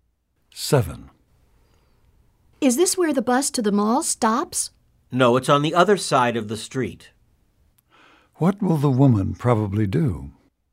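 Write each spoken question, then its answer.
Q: What will the woman probably do?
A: Cross to the other side of the street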